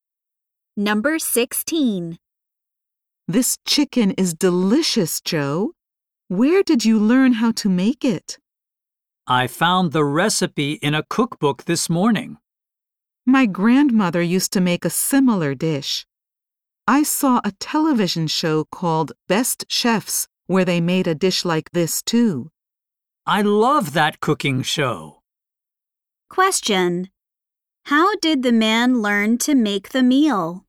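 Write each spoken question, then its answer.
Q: How did the man learn to make the meal?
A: He found the recipe in a cookbook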